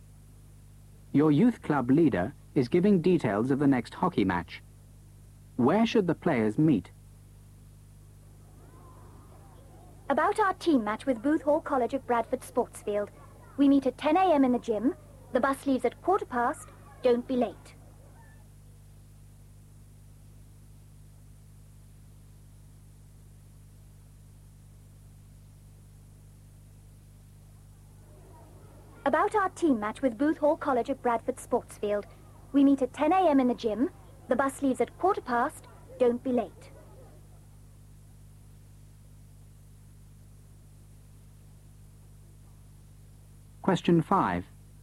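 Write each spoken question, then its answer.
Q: Where should the players meet?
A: In the gym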